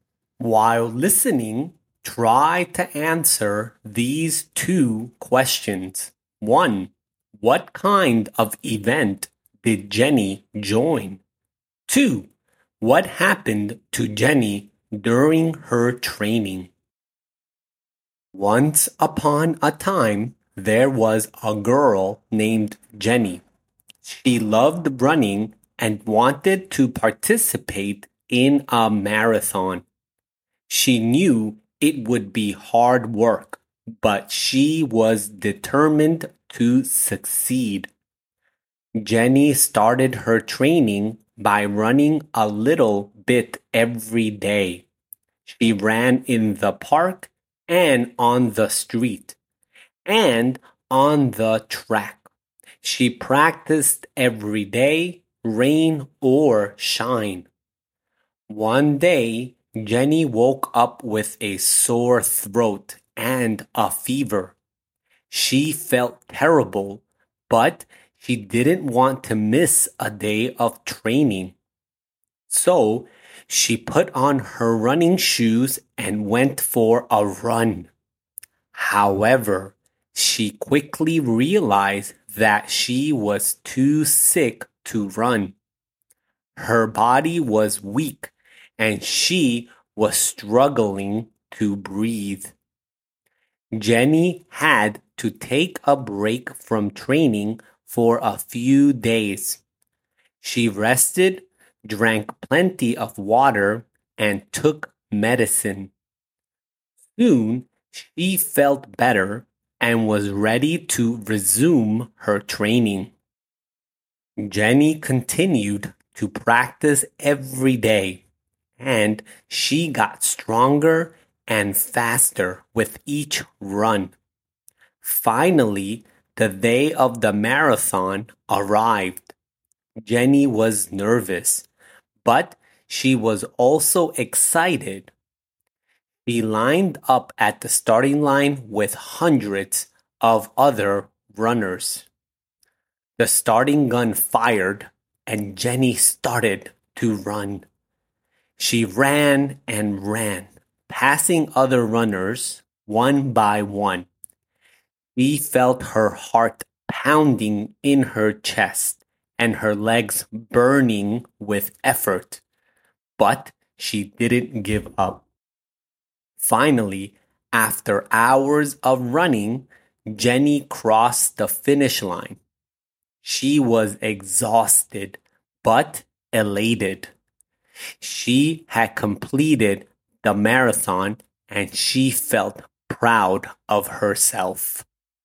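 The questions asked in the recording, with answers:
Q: what kind of event did Jenny join?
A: A marathon

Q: what happened to Jenny during her training?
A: She got sick (sore throat and fever) and had to take a break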